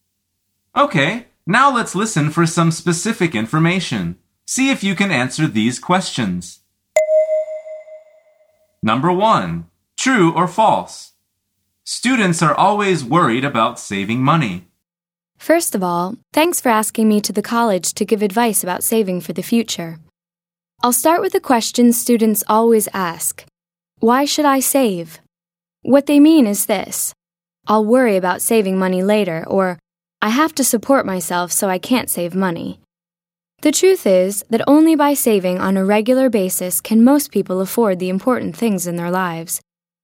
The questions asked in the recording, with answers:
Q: Students are always worried about saving money.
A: The answer is false. The woman says they think they will worry about it later.